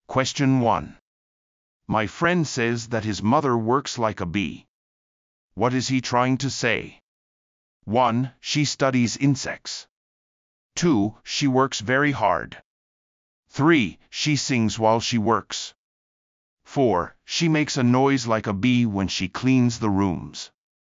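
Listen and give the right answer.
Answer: 2: She works very hard.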